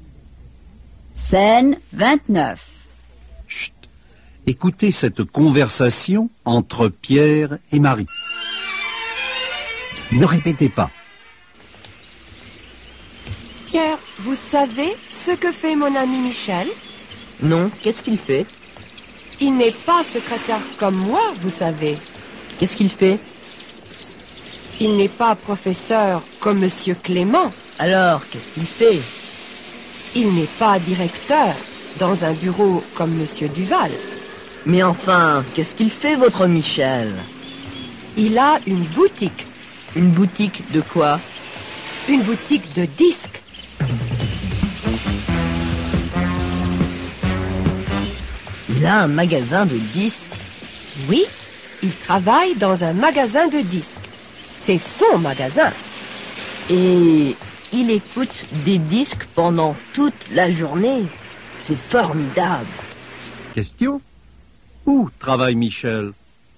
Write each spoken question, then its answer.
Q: Question : où travaille Michel ?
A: Il travaille dans un magasin de disques.